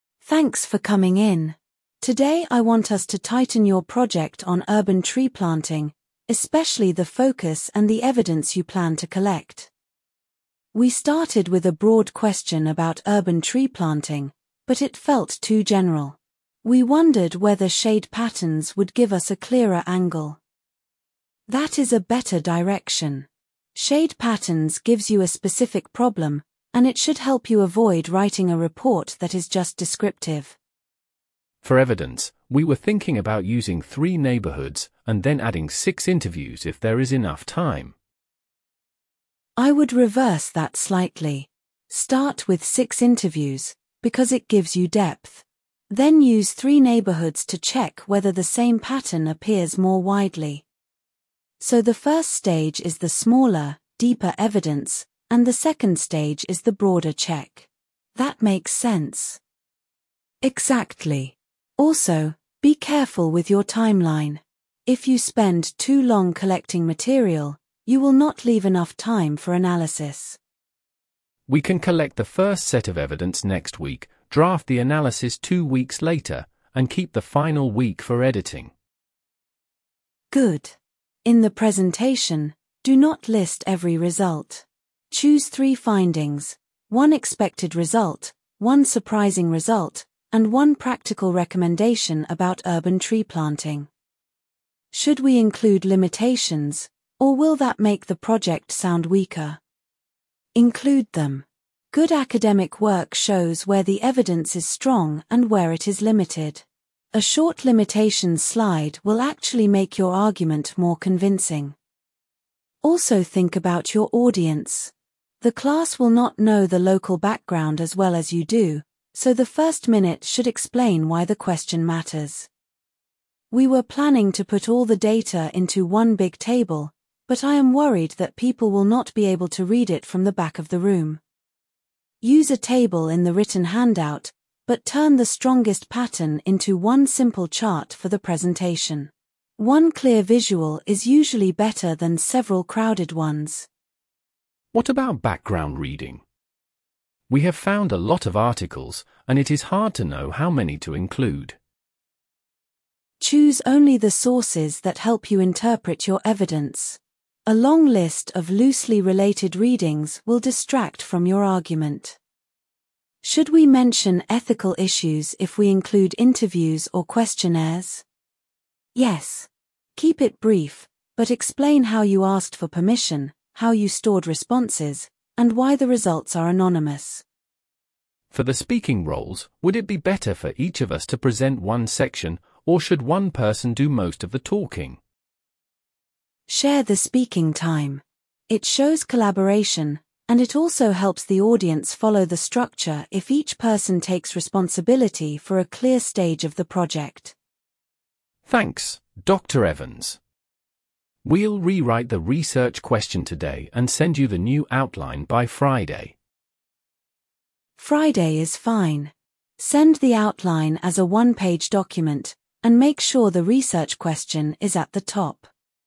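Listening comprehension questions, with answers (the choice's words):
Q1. What is the main purpose of the meeting?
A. To choose a textbook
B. To refine a project on urban tree planting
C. To complain about grades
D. To book a field trip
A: To refine a project on urban tree planting

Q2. What focus do the students suggest?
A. Shade patterns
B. A historical timeline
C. A funding application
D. A grammar exercise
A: Shade patterns

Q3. Which method does the tutor recommend starting with?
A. Three neighbourhoods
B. Six interviews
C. A newspaper search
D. A laboratory test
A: Six interviews

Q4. Why should the students manage their timeline carefully?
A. To avoid booking fees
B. To leave enough time for analysis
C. To finish the reading list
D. To arrange travel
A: To leave enough time for analysis

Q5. How many findings should the students choose for the presentation?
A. Two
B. Three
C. Four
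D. Five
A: Three

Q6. What does the tutor say about limitations?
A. Leave them out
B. Mention them briefly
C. Put them in the appendix only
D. Use them as the title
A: Mention them briefly

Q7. When will the students send the new outline?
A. Today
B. By Friday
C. Next month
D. After the exam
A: By Friday

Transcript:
Tutor: Thanks for coming in. Today I want us to tighten your project on urban tree planting, especially the focus and the evidence you plan to collect.
Student A: We started with a broad question about urban tree planting, but it felt too general. We wondered whether shade patterns would give us a clearer angle.
Tutor: That is a better direction. Shade patterns gives you a specific problem, and it should help you avoid writing a report that is just descriptive.
Student B: For evidence, we were thinking about using three neighbourhoods, and then adding six interviews if there is enough time.
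Tutor: I would reverse that slightly. Start with six interviews, because it gives you depth. Then use three neighbourhoods to check whether the same pattern appears more widely.
Student A: So the first stage is the smaller, deeper evidence, and the second stage is the broader check. That makes sense.
Tutor: Exactly. Also, be careful with your timeline. If you spend too long collecting material, you will not leave enough time for analysis.
Student B: We can collect the first set of evidence next week, draft the analysis two weeks later, and keep the final week for editing.
Tutor: Good. In the presentation, do not list every result. Choose three findings: one expected result, one surprising result, and one practical recommendation about urban tree planting.
Student A: Should we include limitations, or will that make the project sound weaker?
Tutor: Include them. Good academic work shows where the evidence is strong and where it is limited. 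A short limitations slide will actually make your argument more convincing.
Tutor: Also think about your audience. The class will not know the local background as well as you do, so the first minute should explain why the question matters.
Student A: We were planning to put all the data into one big table, but I am worried that people will not be able to read it from the back of the room.
Tutor: Use a table in the written handout, but turn the strongest pattern into one simple chart for the presentation. One clear visual is usually better than several crowded ones.
Student B: What about background reading? We have found a lot of articles, and it is hard to know how many to include.
Tutor: Choose only the sources that help you interpret your evidence. A long list of loosely related readings will distract from your argument.
Student A: Should we mention ethical issues if we include interviews or questionnaires?
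Tutor: Yes. Keep it brief, but explain how you asked for permission, how you stored responses, and why the results are anonymous.
Student B: For the speaking roles, would it be better for each of us to present one section, or should one person do most of the talking?
Tutor: Share the speaking time. It shows collaboration, and it also helps the audience follow the structure if each person takes responsibility for a clear stage of the project.
Student B: Thanks, Dr Evans. We'll rewrite the research question today and send you the new outline by Friday.
Tutor: Friday is fine. Send the outline as a one-page document, and make sure the research question is at the top.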